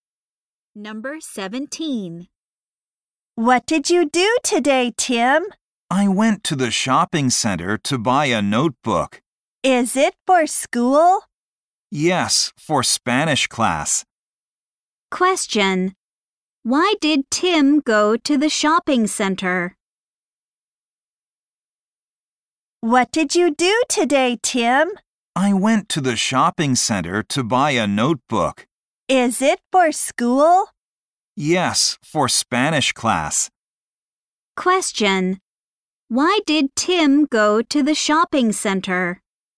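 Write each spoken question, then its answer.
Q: Why did Tim go to the shopping center?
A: To buy a notebook.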